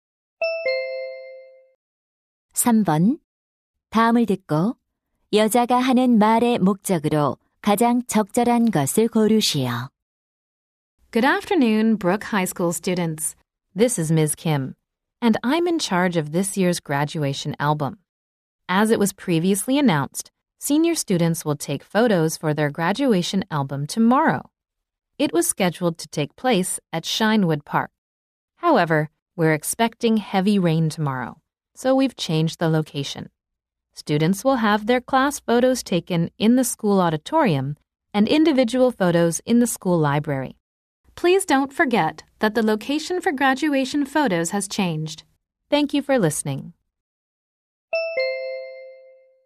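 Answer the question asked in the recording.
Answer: 졸업 앨범 사진 촬영 장소 변경을 알리려고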